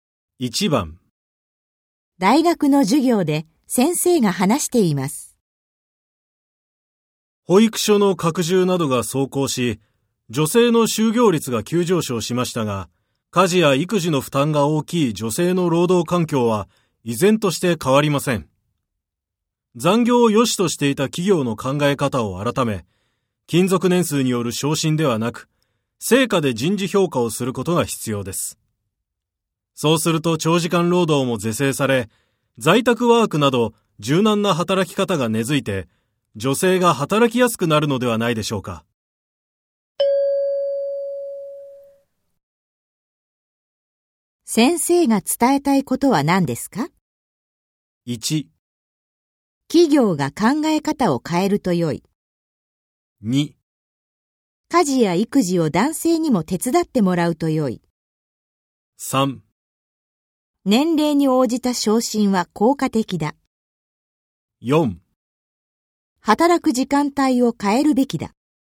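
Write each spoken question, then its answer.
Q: 先生が伝えたいことは何ですか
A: 1: 企業が考え方を変えると良い。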